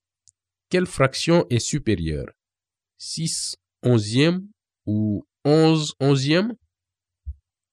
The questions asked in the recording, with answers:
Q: Quelle fraction est supérieure?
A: 11 onzièmes est supérieur à 6 onzièmes, car le numérateur 11 est supérieur au numérateur 6.